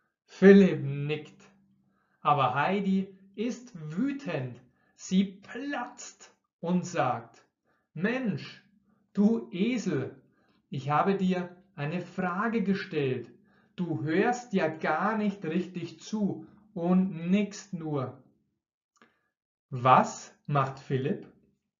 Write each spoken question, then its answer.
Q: Was macht Philipp?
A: Er nickt. Philipp nickt nur.